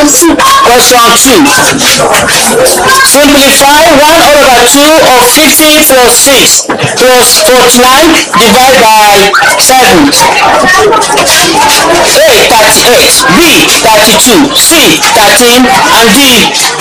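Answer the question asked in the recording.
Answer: A: 38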